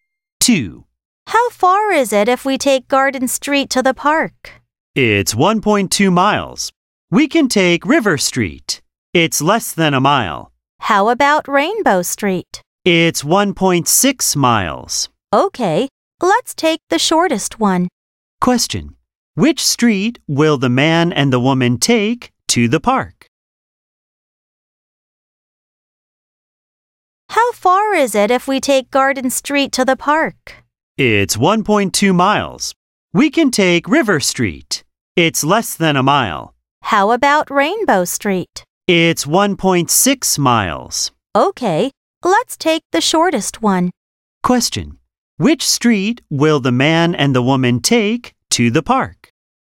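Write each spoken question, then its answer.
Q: Which street will the man and the woman take to the park?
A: River Street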